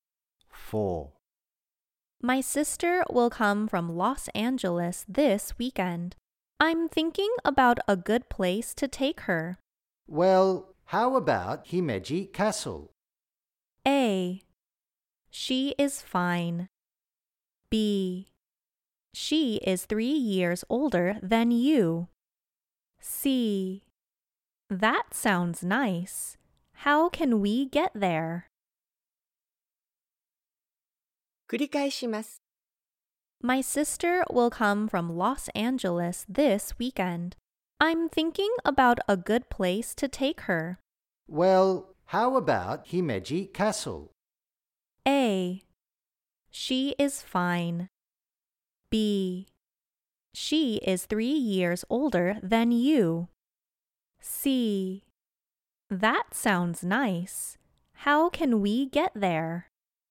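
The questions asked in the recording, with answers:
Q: Well, how about Himeji Castle?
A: C: That sounds nice. How can we get there?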